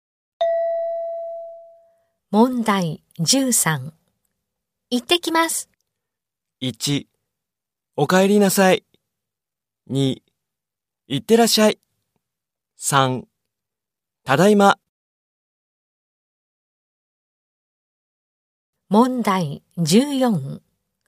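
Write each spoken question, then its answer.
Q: 行ってきます。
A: 3: 行ってらっしゃい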